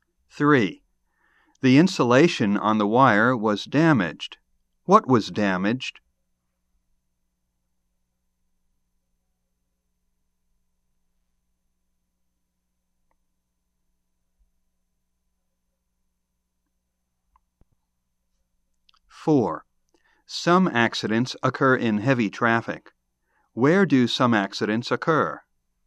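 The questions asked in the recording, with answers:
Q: Where do some accidents occur?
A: In heavy traffic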